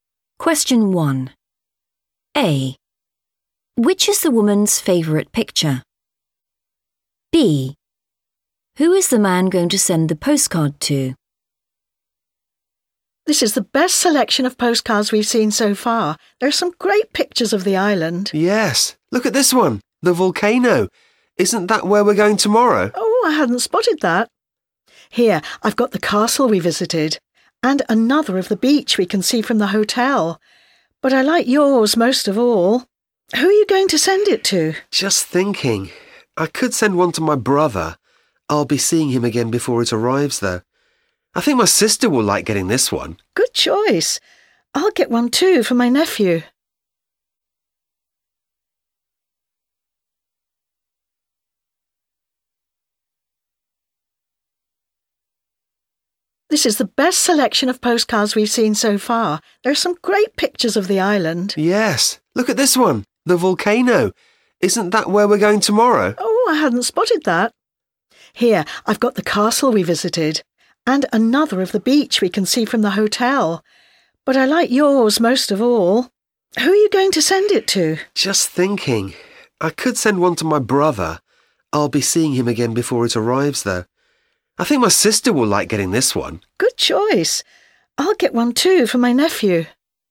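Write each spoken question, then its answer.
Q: Which is the woman's favourite picture?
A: the volcano

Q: Who is the man going to send the postcard to?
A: his sister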